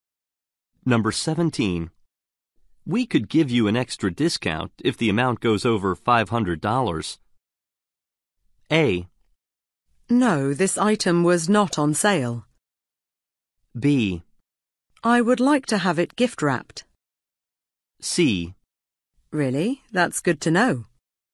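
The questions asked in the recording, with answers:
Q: We could give you an extra discount if the amount goes over $500.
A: C: Really? That's good to know.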